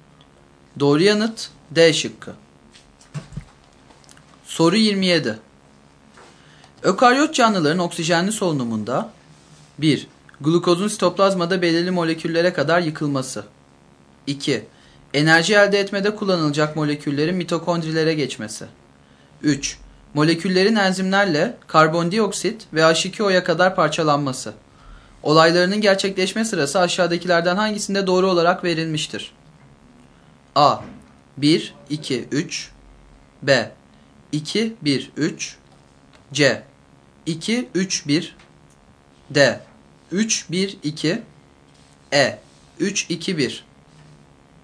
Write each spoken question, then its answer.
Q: Olaylarının gerçekleşme sırası aşağıdakilerden hangisinde doğru olarak verilmiştir?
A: Doğru yanıt A şıkkı.